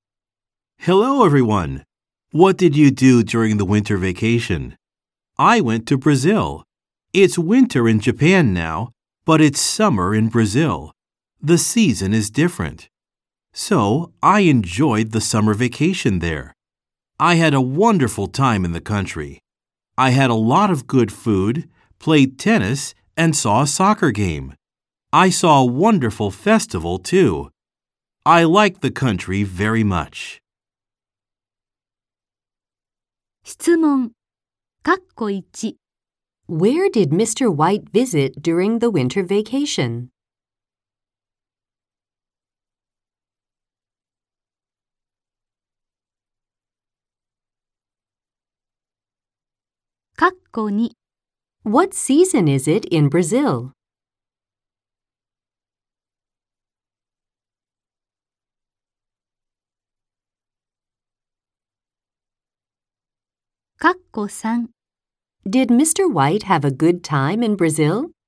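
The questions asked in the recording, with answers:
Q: Where did Mr. White visit during the winter vacation?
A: Brazil

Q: What season is it in Brazil?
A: Summer

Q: Did Mr. White have a good time in Brazil?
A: Yes, he did.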